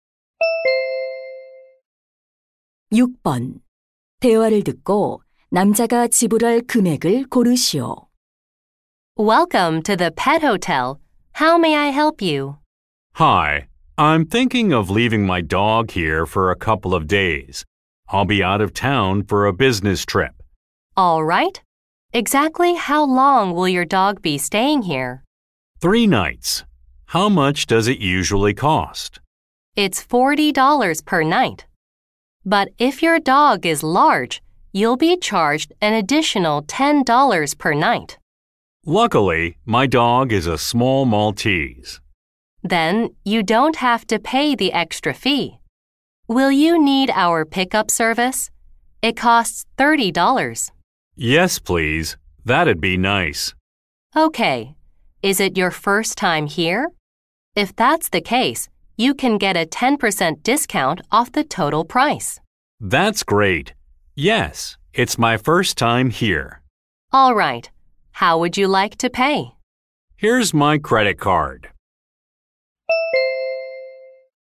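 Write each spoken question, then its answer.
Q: 대화를 듣고 남자가 지불할 금액을 고르시오.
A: $135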